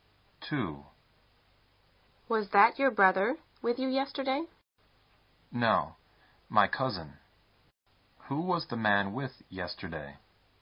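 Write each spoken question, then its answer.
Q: Who was the man with yesterday?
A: His cousin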